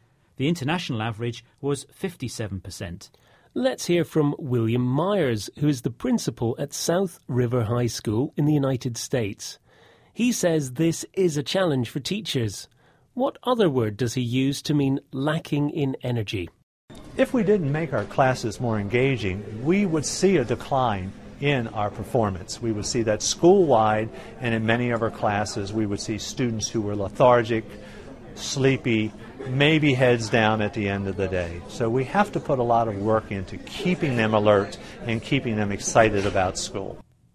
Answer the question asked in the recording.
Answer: The word he used was lethargic.